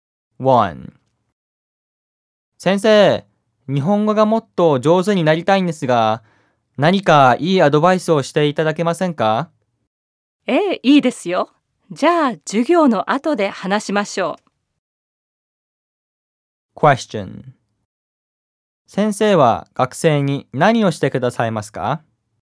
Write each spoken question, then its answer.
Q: 先生は学生に何をしてくださいますか?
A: 先生は学生にいいアドバイスをしてくださいます。